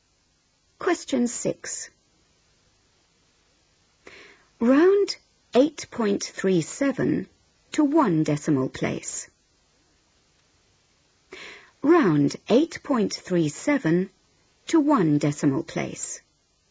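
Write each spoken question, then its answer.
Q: Round 8.37 to one decimal place.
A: 8.4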